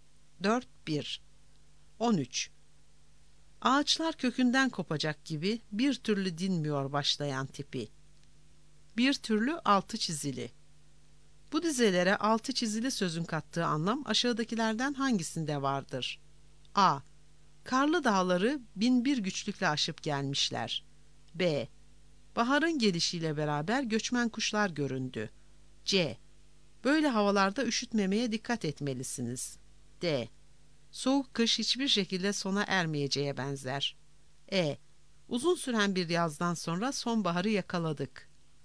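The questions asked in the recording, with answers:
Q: Bu dizelere altı çizili sözün kattığı anlam aşağıdakilerden hangisinde vardır?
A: D: Soğuk kış hiçbir şekilde sona ermeyeceğe benzer.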